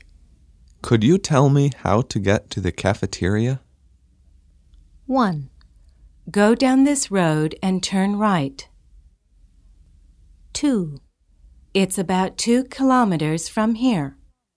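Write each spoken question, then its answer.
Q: Could you tell me how to get to the cafeteria?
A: 1: Go down this road and turn right.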